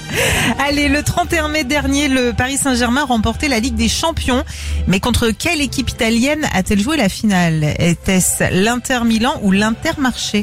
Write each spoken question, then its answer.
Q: Mais contre quelle équipe italienne a-t-elle joué la finale? Était-ce l'Inter Milan ou l'Inter Marché?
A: L'Inter Milan.